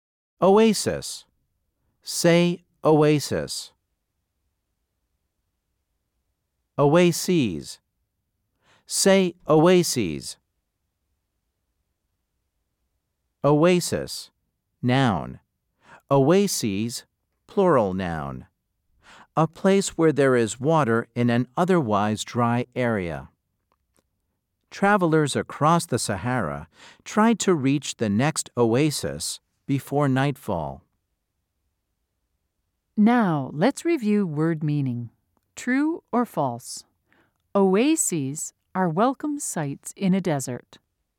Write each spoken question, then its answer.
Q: True or false? Oases are welcome sites in a desert.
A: If you said true, you are correct.